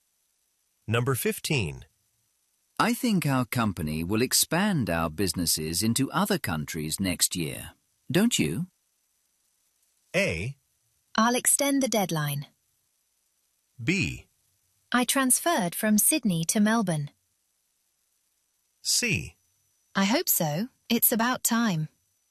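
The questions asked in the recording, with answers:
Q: I think our company will expand our businesses into other countries next year, don't you?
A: C: I hope so. It's about time.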